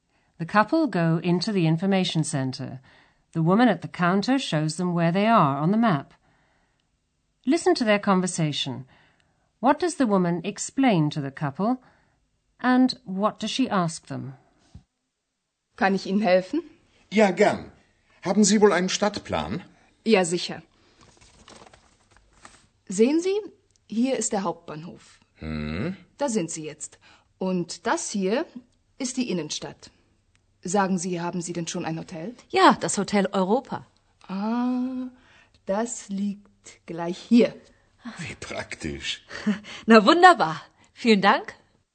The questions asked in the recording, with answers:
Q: What does the woman explain to the couple and what does she ask them?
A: First, the woman shows the couple where they are on the map.